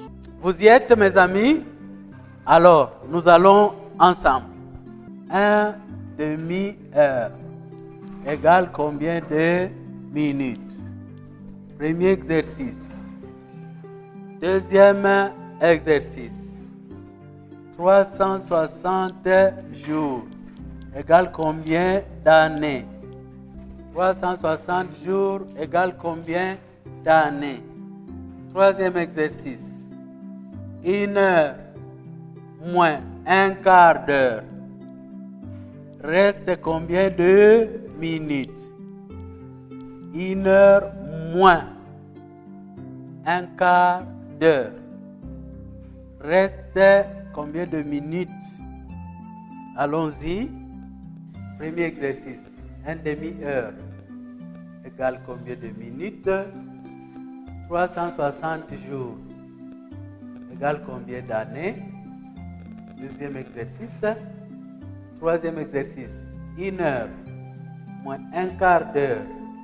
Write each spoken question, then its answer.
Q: Un demi-heure égale combien de minutes?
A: Une demi-heure égale à 30 minutes.

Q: 360 jours égale combien d'années?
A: 360 jours égale à une année.

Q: Reste combien de minutes?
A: Une heure moins un quart d'heure égale 45 minutes.